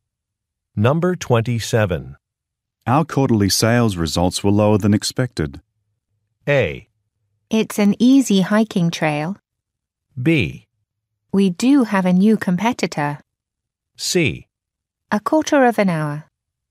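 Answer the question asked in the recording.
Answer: B: We do have a new competitor.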